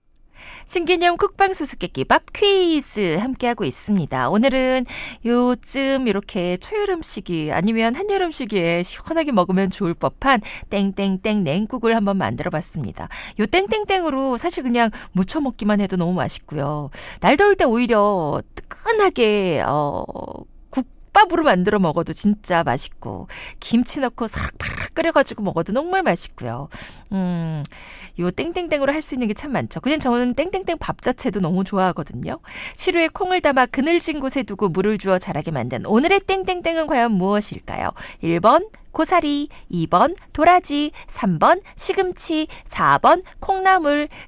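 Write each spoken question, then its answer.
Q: 시루에 콩을 담아 그늘진 곳에 두고 물을 주어 자라게 만든 오늘의 땡땡땡은 과연 무엇일까요?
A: 4: 콩나물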